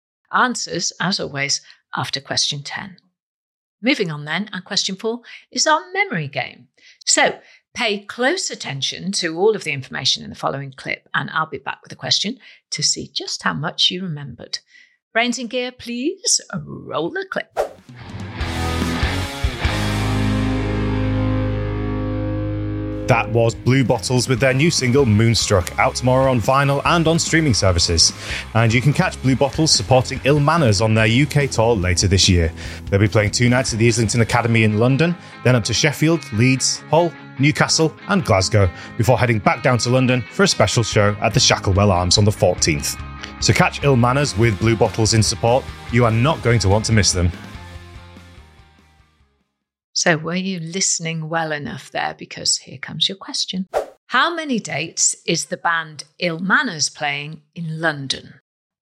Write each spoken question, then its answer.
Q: How many dates is the band Ill Manners playing in London?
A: And the answer was three dates.